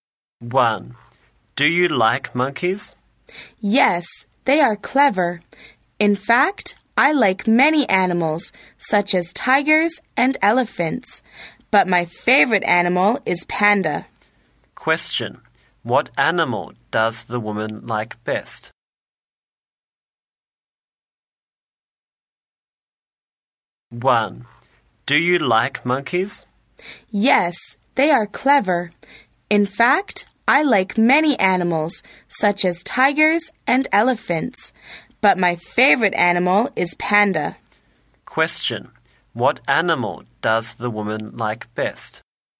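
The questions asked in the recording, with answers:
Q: What animal does the woman like best?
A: Panda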